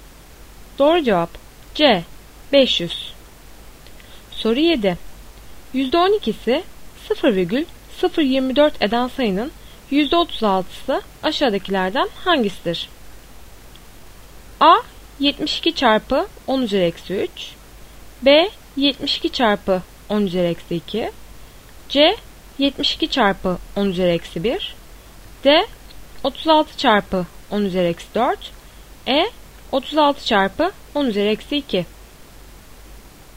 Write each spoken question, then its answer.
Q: %12'si 0,024 eden sayının %36'sı aşağıdakilerden hangisidir?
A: Doğru cevap A 72 çarpı 10 üzeri eksi 3.